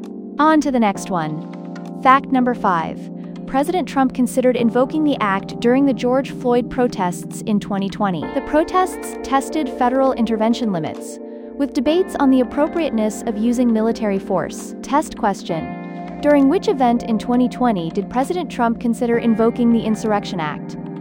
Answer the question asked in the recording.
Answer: George Floyd protests.